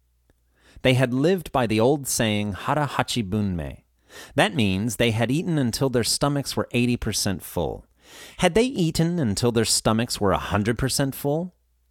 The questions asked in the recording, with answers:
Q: Had they eaten until their stomachs were 100% full?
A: No, they hadn't. They had eaten until their stomachs were 80% full.